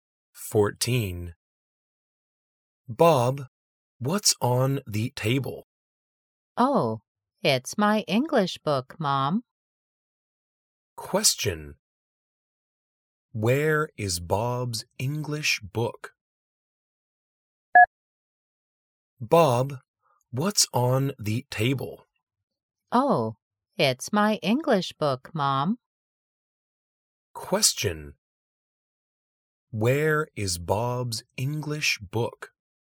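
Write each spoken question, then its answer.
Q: Where is Bob's English book?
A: On the table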